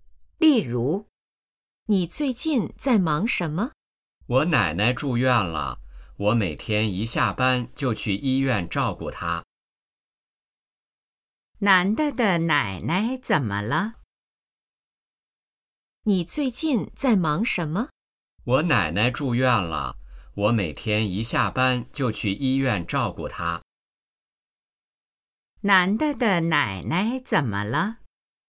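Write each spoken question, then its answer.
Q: 男的的奶奶怎么了?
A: 住院了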